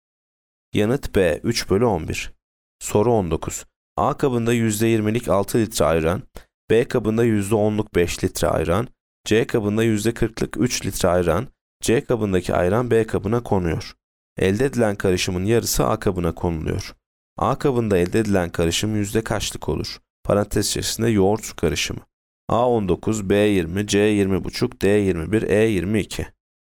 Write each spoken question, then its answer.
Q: A kabında elde edilen karışım yüzde kaçlık olur?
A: Yanıt C 20,5.